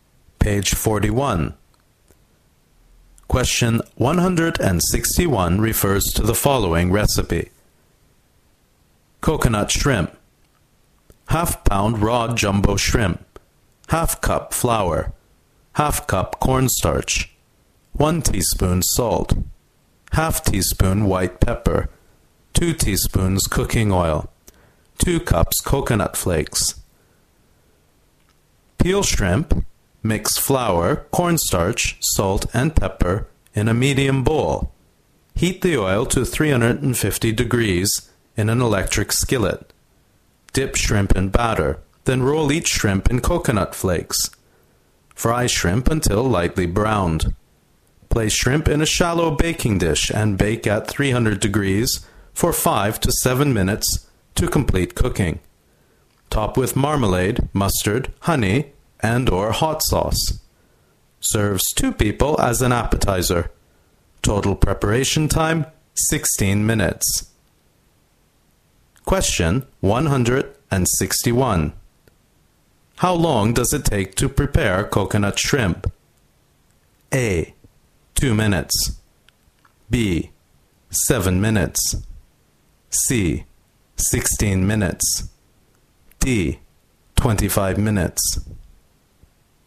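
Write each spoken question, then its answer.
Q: How long does it take to prepare coconut shrimp?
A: C: 16 minutes.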